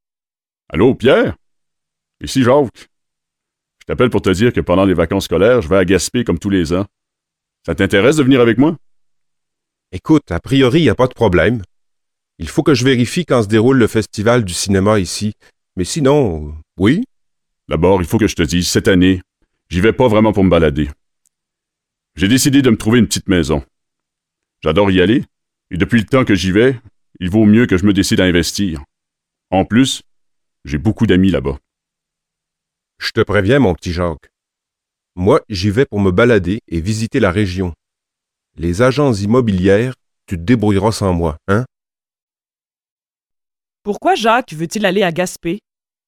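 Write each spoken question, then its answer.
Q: Pourquoi Jacques veut-il aller à Gaspé?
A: Pour s'acheter une petite maison (investir)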